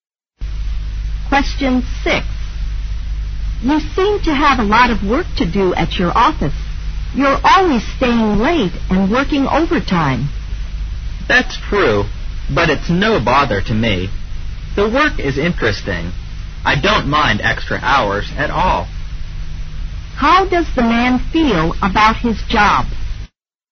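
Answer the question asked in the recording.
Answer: He finds it interesting and doesn't mind working extra hours.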